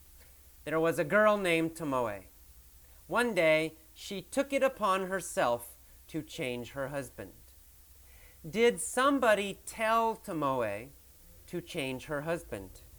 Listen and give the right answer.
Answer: No, nobody told her. She took it upon herself.